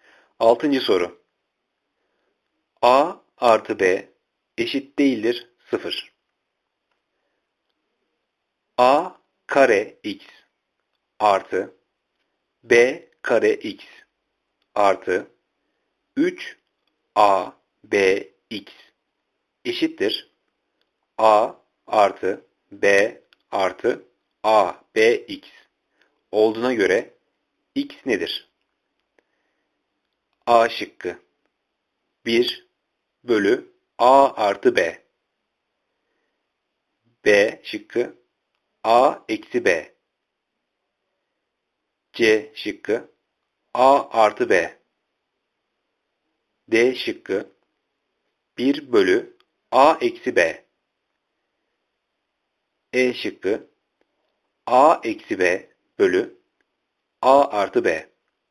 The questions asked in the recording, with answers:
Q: A kare x artı B kare x artı 3 a b x eşittir a artı b artı a b x olduğuna göre x nedir?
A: Cevap A. 1 bölü A artı B.